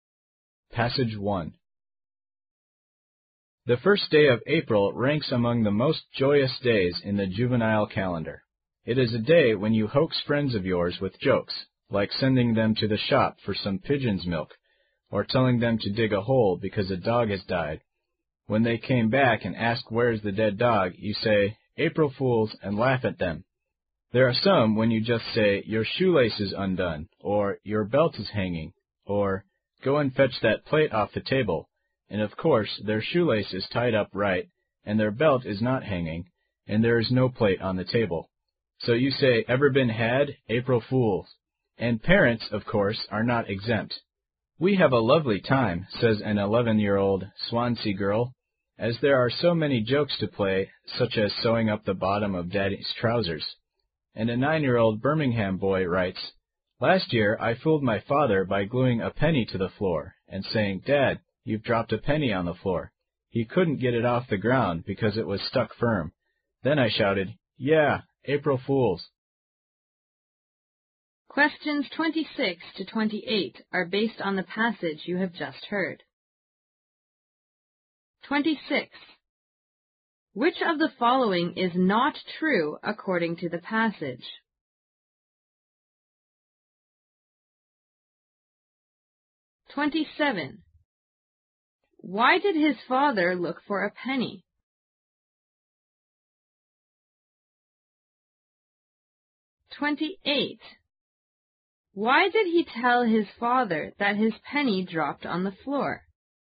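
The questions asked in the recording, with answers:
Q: Why did his father look for a penny?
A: His son told him he had dropped a penny on the floor

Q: Why did he tell his father that his penny dropped on the floor?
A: To play an April Fools' joke on him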